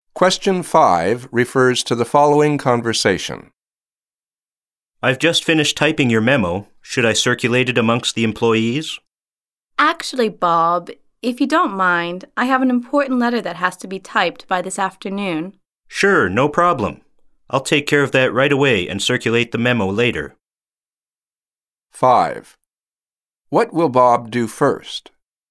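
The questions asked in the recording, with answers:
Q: What will Bob do first?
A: Type an important letter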